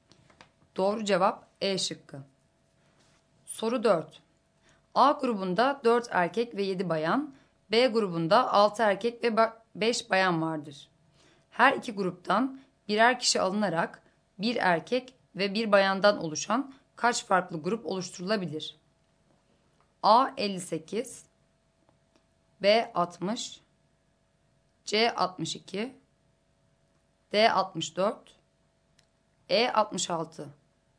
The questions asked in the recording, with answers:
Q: Her iki gruptan birer kişi alınarak bir erkek ve bir bayandan oluşan kaç farklı grup oluşturulabilir?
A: Doğru cevap C şıkkı.